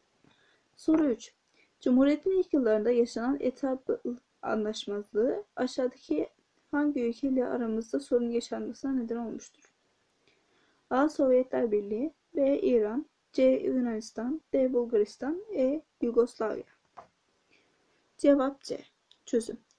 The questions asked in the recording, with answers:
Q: Cumhuriyet'in ilk yıllarında yaşanan etap anlaşmazlığı aşağıdaki hangi ülkeyle aramızda sorun yaşanmasına neden olmuştur?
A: Cevap C.